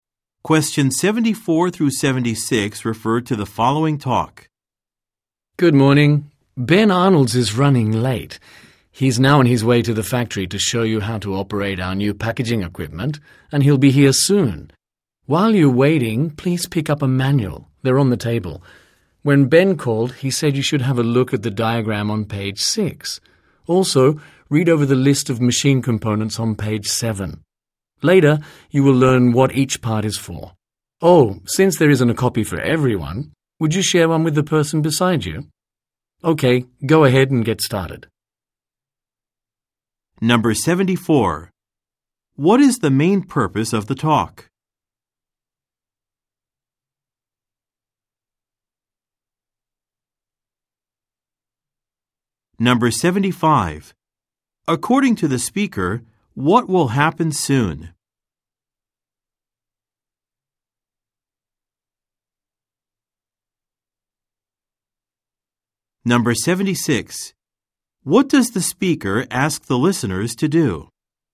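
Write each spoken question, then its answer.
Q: According to the speaker, what will happen soon?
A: Ben Arnold will arrive to show them how to operate the new packaging equipment

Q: What does the speaker ask the listeners to do?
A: Share a manual with the person beside them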